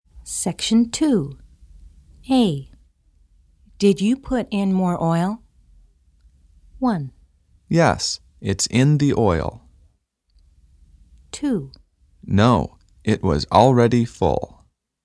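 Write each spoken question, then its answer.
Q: Did you put in more oil?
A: 2: No, it was already full.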